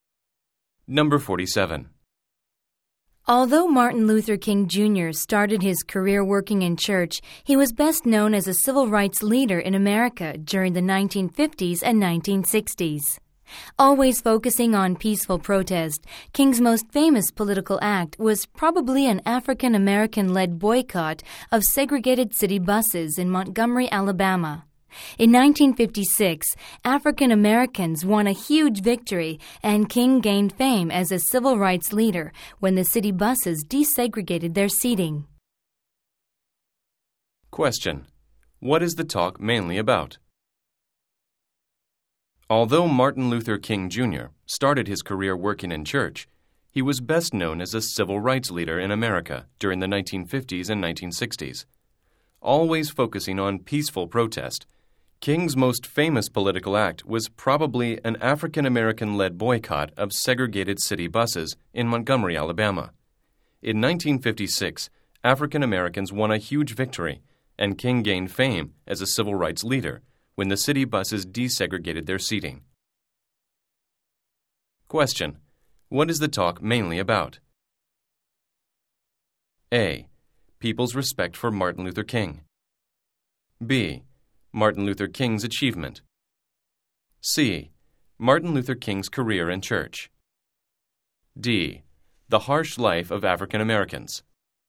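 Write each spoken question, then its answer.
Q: What is the talk mainly about?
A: B: Martin Luther King's achievement.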